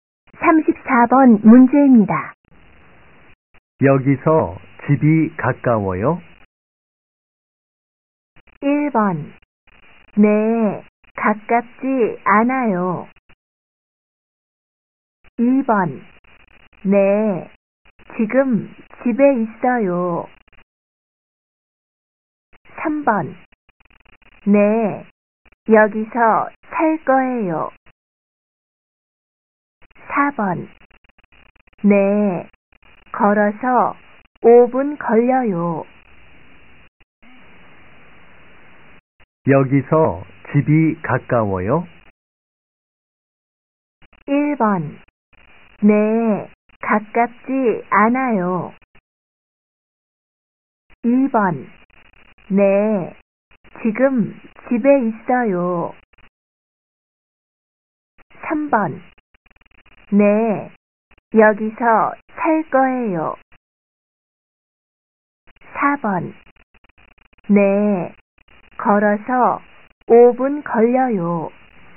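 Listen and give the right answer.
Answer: 4: 네, 걸어서 5분 걸려요.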